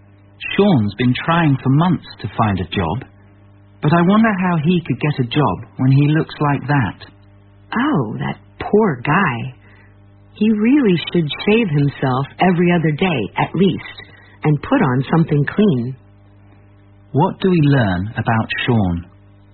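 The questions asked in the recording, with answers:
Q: What do we learn about Sean?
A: He looks messy and untidy, which may be why he can't get a job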